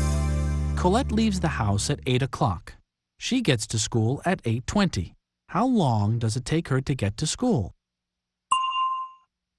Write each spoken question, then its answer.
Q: How long does it take her to get to school?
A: It takes her 20 minutes. It takes her 20 minutes to get to school.